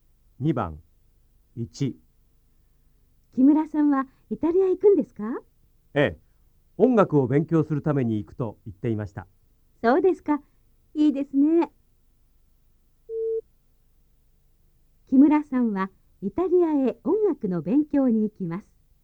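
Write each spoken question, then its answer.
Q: 木村さんはイタリアへ音楽の勉強に行きます。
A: ○(正しい)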